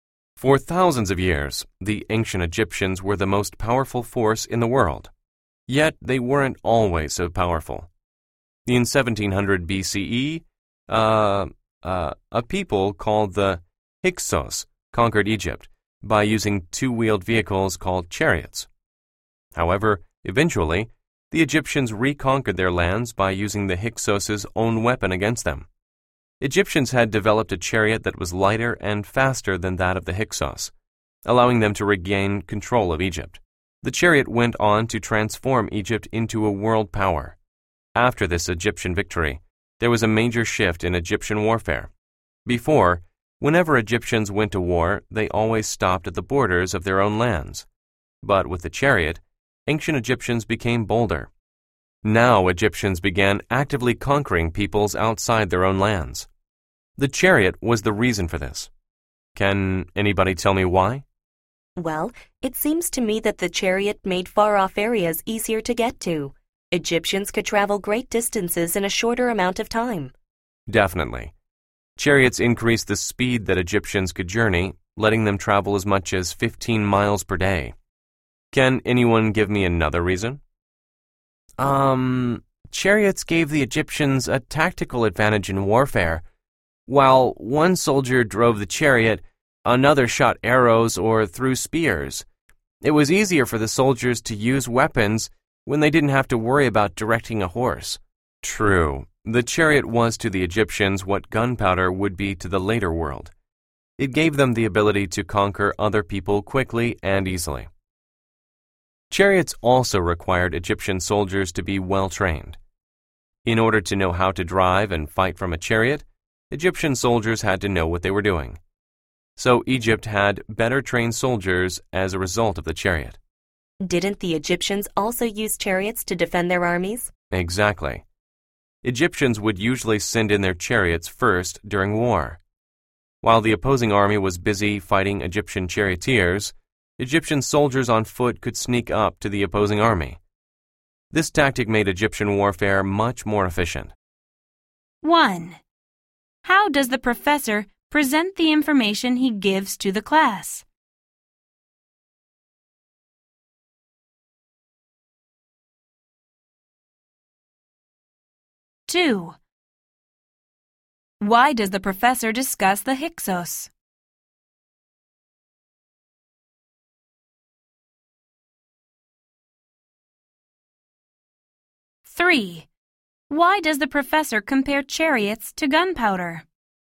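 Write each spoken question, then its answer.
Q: Why does the professor compare chariots to gunpowder?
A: To show that chariots let the Egyptians conquer other peoples quickly and easily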